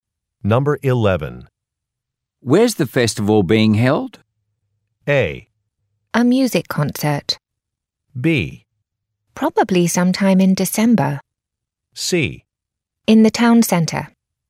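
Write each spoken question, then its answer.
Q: Where's the festival being held?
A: C: In the town centre.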